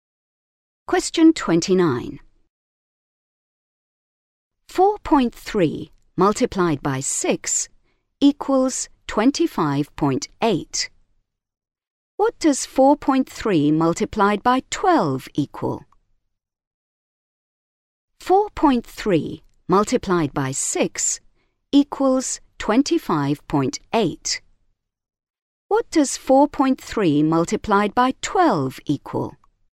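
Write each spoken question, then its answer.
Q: What does 4.3 multiplied by 12 equal?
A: 51.6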